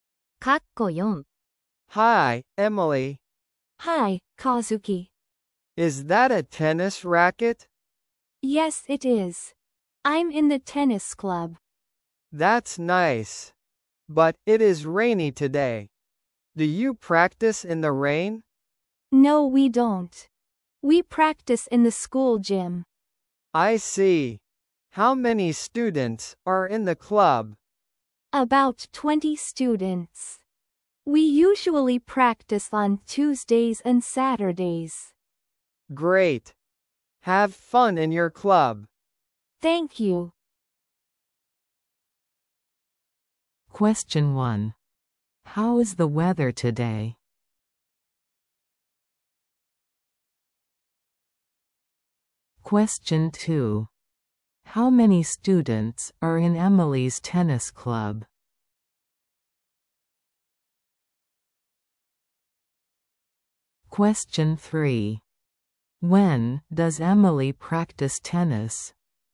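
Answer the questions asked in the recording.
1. Rainy
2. About 20
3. On Tuesdays and Saturdays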